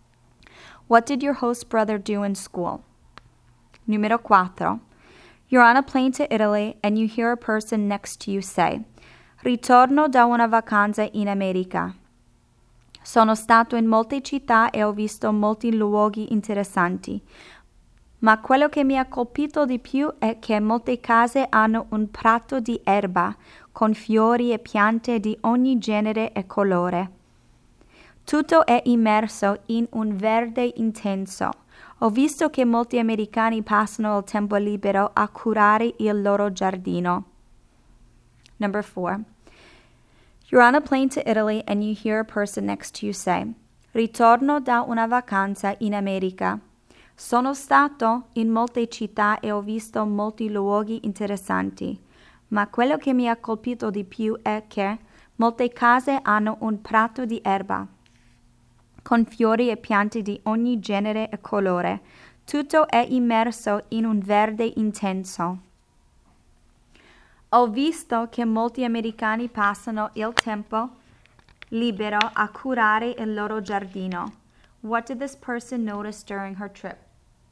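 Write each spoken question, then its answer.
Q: What did this person notice during her trip?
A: Many American houses have lawns and gardens that people spend their free time caring for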